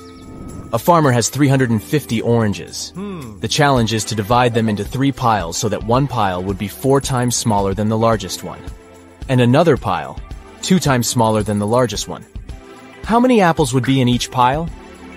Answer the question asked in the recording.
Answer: Zero. The farmer has 350 oranges, not apples.